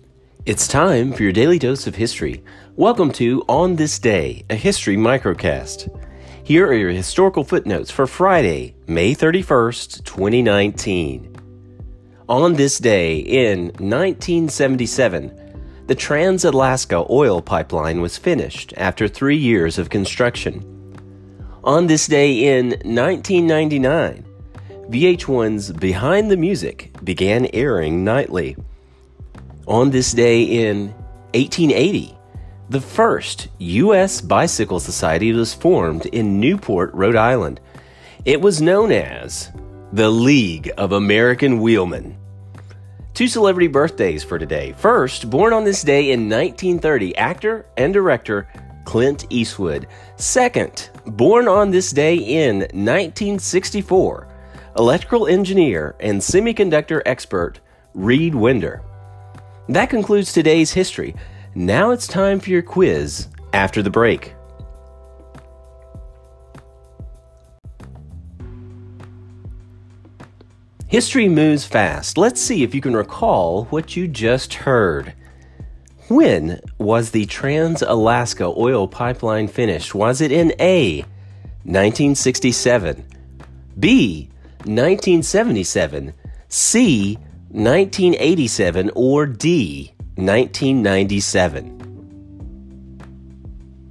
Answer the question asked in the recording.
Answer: Answer, B, 1977.